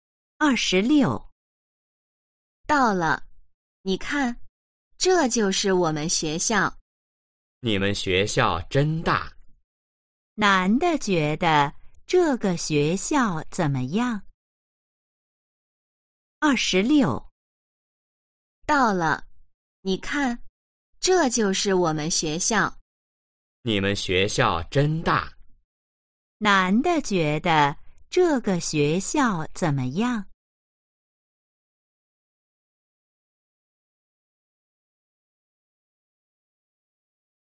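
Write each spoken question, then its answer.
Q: 男的觉得这个学校怎么样?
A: 很大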